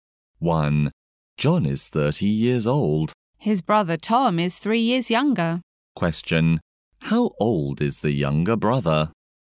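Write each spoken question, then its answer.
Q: How old is the younger brother?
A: 27 years old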